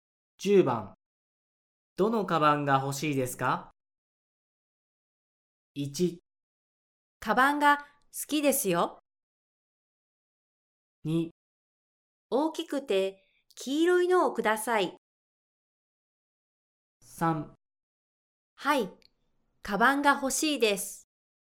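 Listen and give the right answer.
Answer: 2: 大きくて黄色いのをください。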